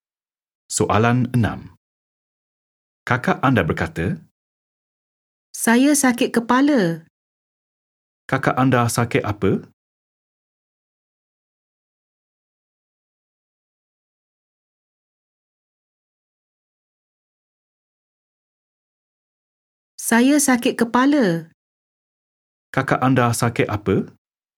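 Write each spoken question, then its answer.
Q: Kakak anda sakit apa?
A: Sakit kepala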